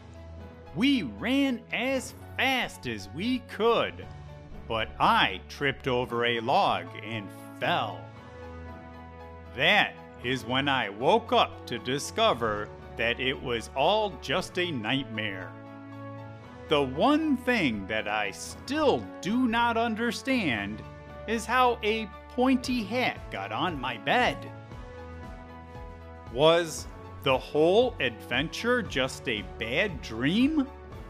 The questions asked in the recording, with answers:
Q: Was the whole adventure just a bad dream?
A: When I woke up in my bed, I realized that it was just a nightmare